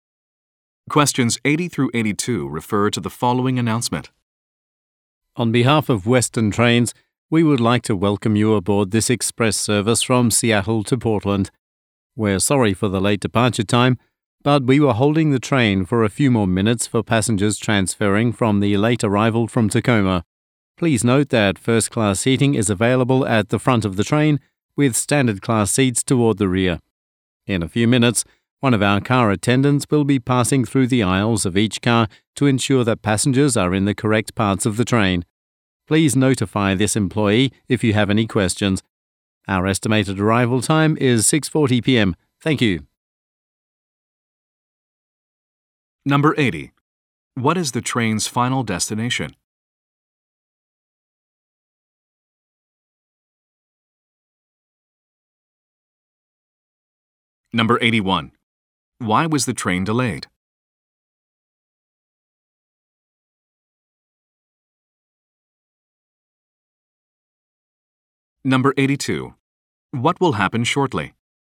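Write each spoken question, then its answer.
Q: What is the train's final destination?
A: Portland

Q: Why was the train delayed?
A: It waited for transferring passengers from Tacoma

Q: What will happen shortly?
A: An attendant will check passengers are in the correct parts of the train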